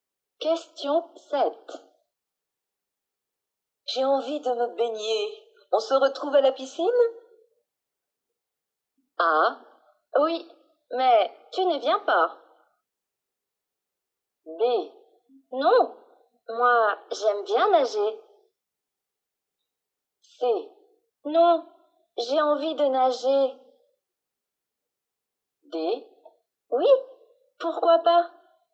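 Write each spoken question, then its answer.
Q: J'ai envie de me baigner. On se retrouve à la piscine?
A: D: Oui, pourquoi pas ?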